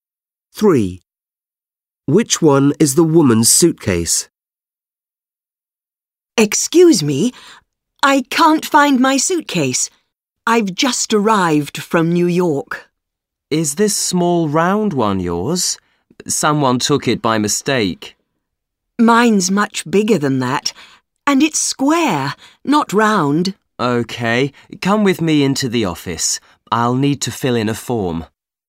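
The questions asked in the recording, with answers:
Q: Which one is the woman's suitcase?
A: A big square suitcase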